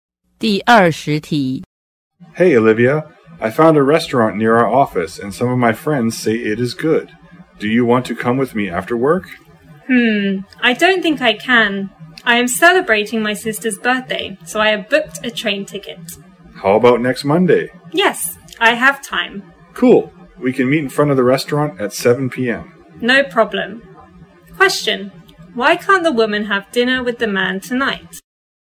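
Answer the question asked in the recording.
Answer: She is celebrating her sister's birthday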